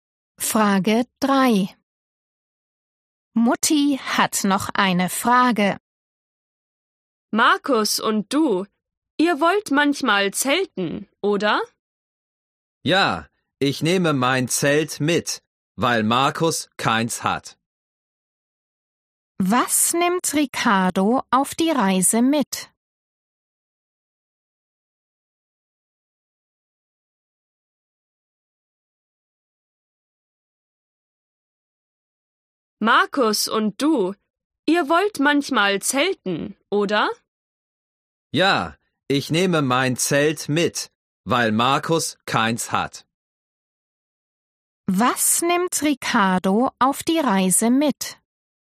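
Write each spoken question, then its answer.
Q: Was nimmt Ricardo auf die Reise mit?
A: sein Zelt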